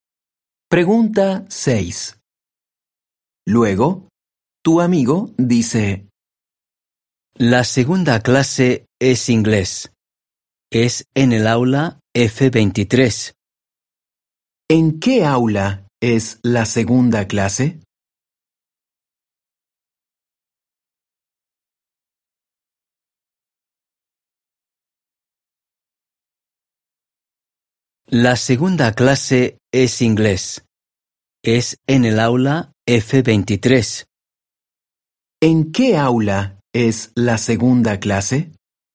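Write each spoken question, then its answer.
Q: ¿En qué aula es la segunda clase?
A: En el aula F23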